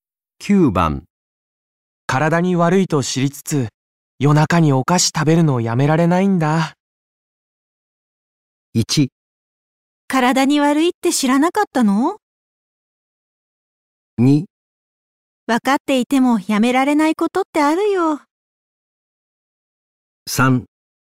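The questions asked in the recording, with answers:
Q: 体に悪いと知りつつ、夜中にお菓子食べるのをやめられないんだ。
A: 2: 分かっていてもやめられないことってあるよ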